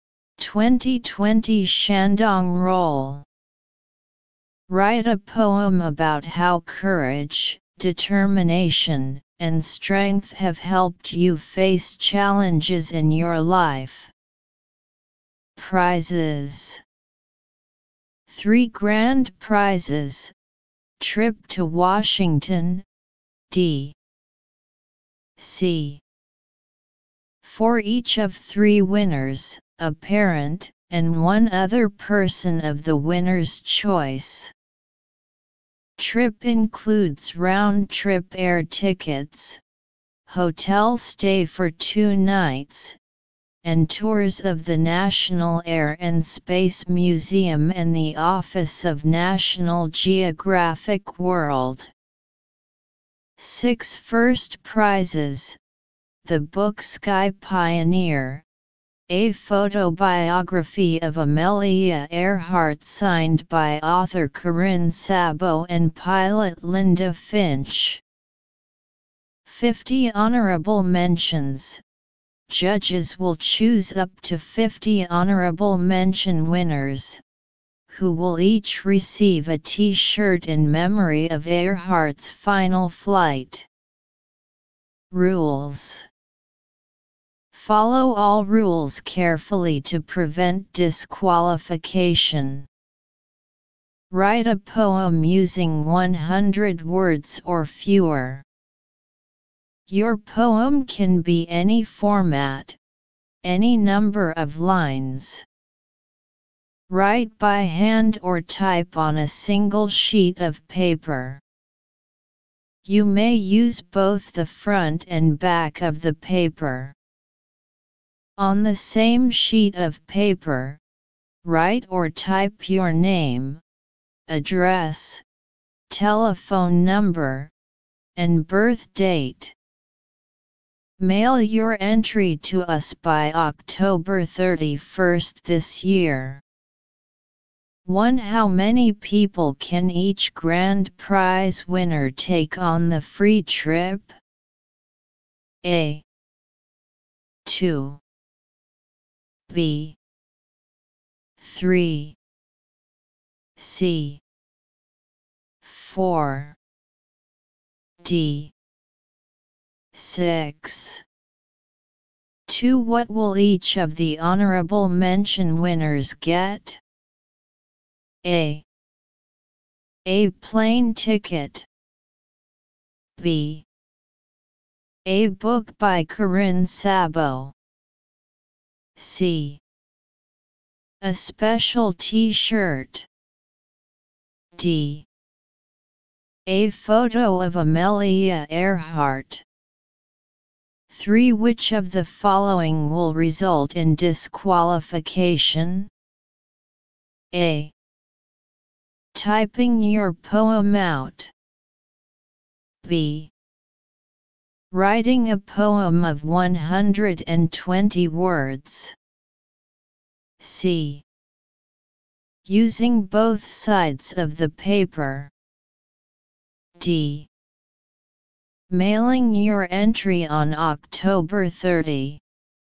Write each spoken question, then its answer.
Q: How many people can each grand prize winner take on the free trip?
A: Therefore, choose option A.

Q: What will each of the honorable mention winners get?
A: So choose option C.

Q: Which of the following will result in disqualification?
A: So choose option B.